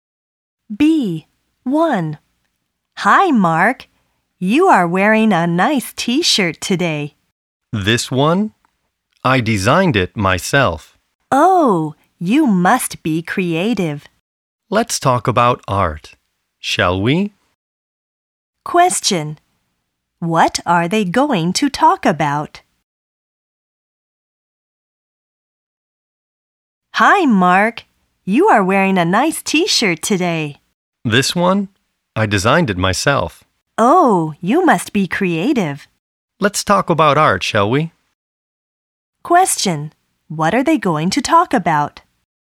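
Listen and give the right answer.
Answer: Art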